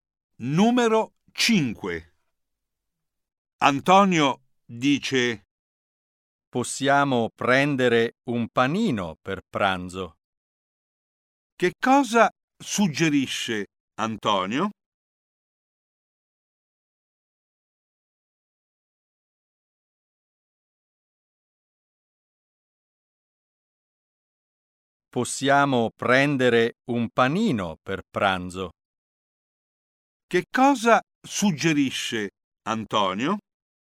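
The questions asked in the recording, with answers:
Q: Che cosa suggerisce Antonio?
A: Prendere un panino per pranzo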